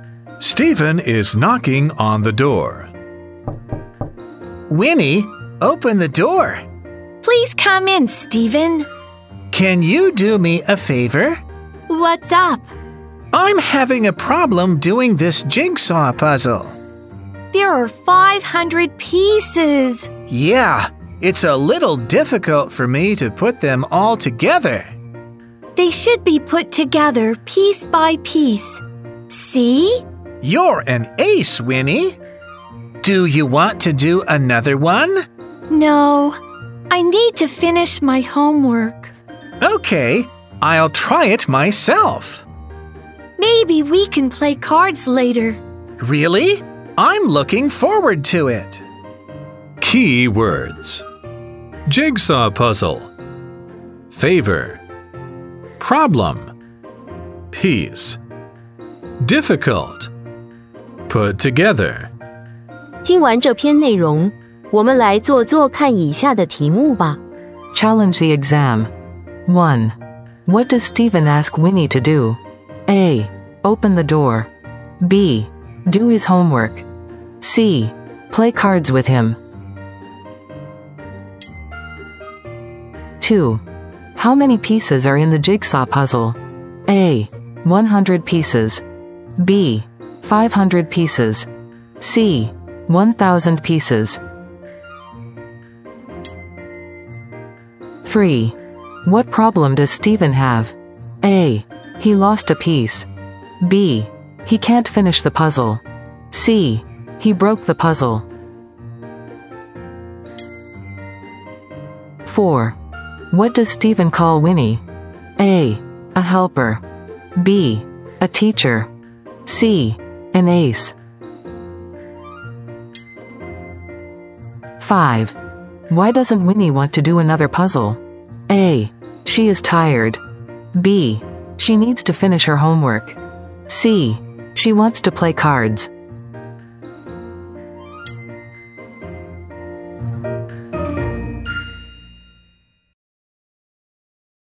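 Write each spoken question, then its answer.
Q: How many pieces are in the jigsaw puzzle?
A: B: 500 pieces.

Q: What problem does Stephen have?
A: B: He can't finish the puzzle.

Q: What does Stephen call Winnie?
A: C: An ace.

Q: Why doesn't Winnie want to do another puzzle?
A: B: She needs to finish her homework.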